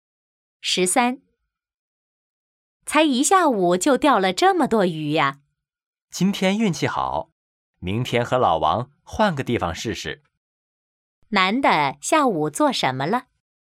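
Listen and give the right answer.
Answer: 钓鱼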